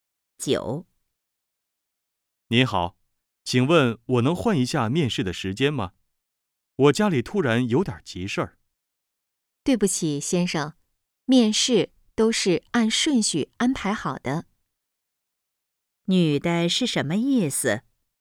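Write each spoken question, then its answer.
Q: 女的是什么意思?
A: 不能换面试时间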